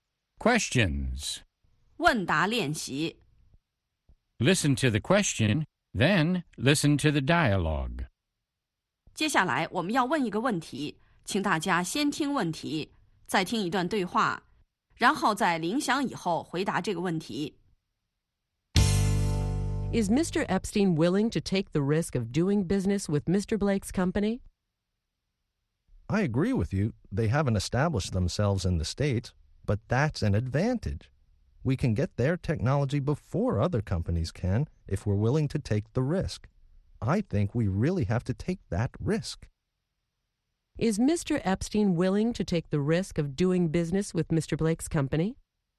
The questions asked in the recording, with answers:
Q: Is Mr. Epstein willing to take the risk of doing business with Mr. Blake's company?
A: Yes, he is. He thinks they really have to take that risk.